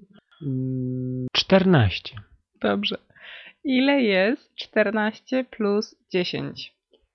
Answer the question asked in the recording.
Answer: 24.